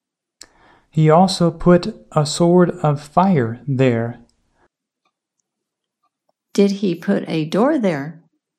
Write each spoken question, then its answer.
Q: Did he put a door there?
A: No, he put a sword there.